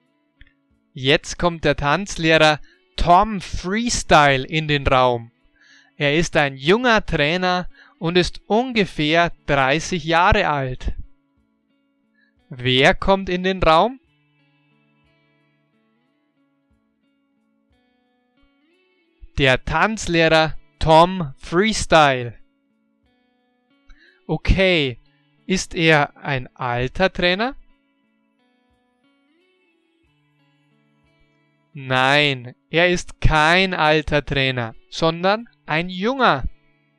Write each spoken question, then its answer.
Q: Wer kommt in den Raum?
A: Der Tanzlehrer Tom Freestyle.